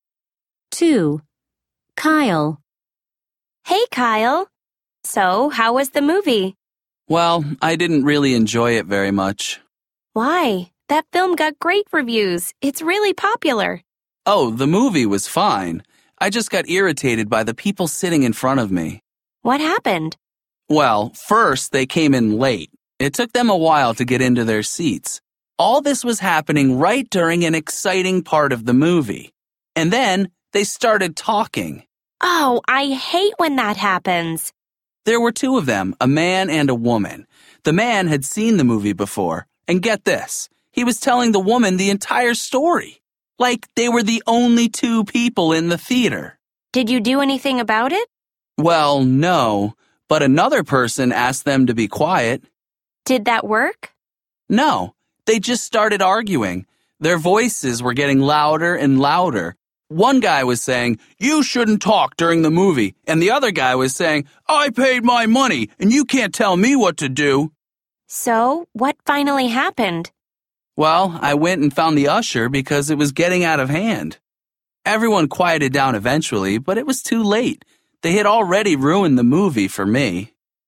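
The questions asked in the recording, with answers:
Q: 2. Kyle.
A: People in front of him at the movie came in late and talked during the movie.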